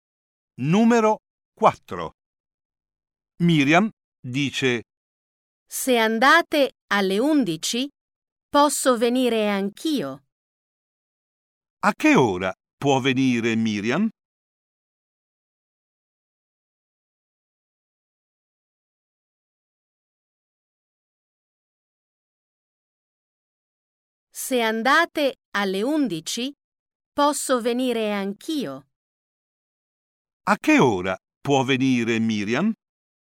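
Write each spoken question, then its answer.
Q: A che ora può venire Miriam?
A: Alle 11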